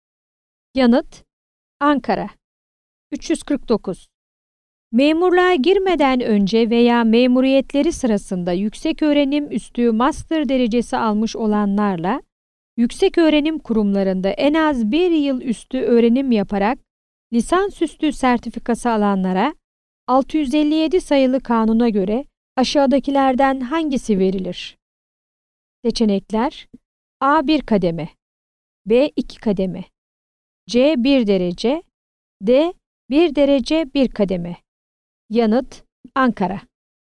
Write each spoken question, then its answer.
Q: Memurluğa girmeden önce veya memuriyetleri sırasında yüksek öğrenim üstü master derecesi almış olanlarla, yüksek öğrenim kurumlarında en az bir yıl üstü öğrenim yaparak lisans üstü sertifikası alanlara 657 sayılı kanuna göre aşağıdakilerden hangisi verilir?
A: Yanıt: Ankara.